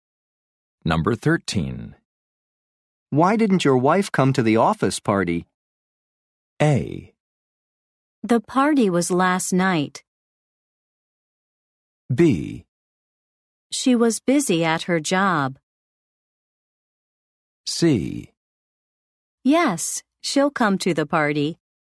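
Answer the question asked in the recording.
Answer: B: She was busy at her job.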